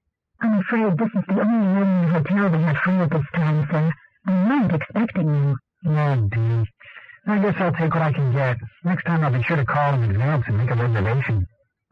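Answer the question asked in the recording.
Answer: He didn't make a reservation in advance.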